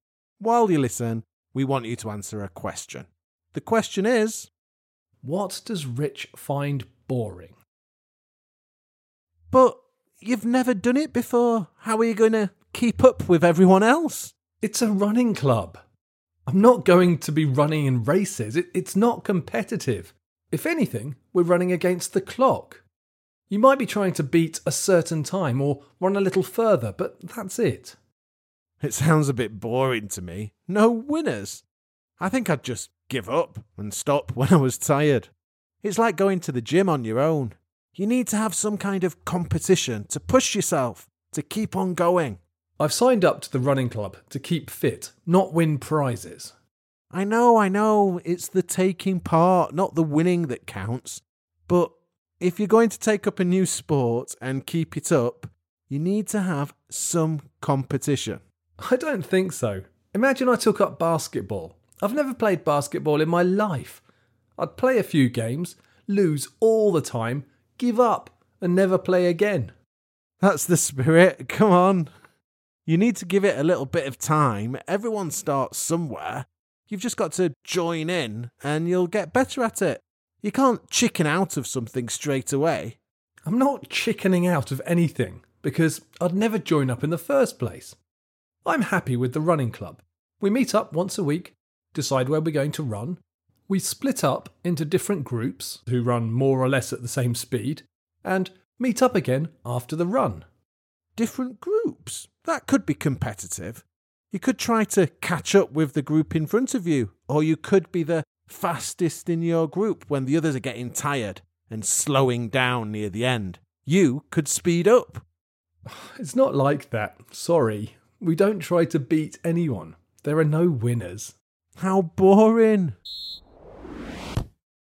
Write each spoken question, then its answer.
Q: What does Rich find boring?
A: mainly I find the idea of sport or exercise without competition boring.